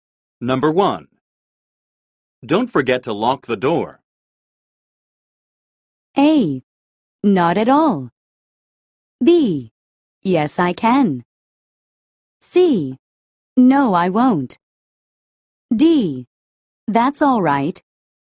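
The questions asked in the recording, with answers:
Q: Don't forget to lock the door.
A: C: No, I won't.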